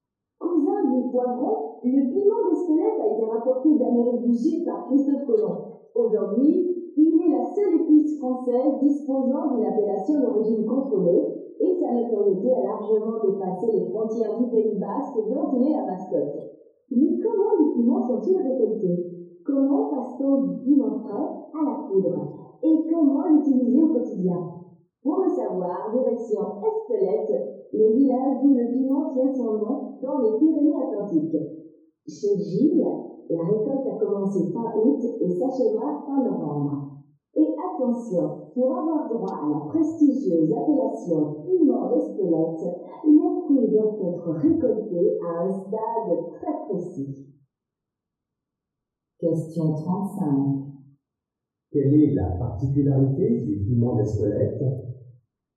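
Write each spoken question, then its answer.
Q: Quelle est la particularité du piment d'Espelette ?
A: C'est la seule épice française disposant d'une appellation d'origine contrôlée.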